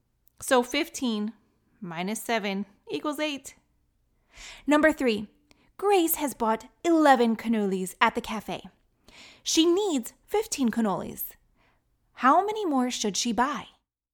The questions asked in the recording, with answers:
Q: How many more should she buy?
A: 4. 15 minus 11 equals 4.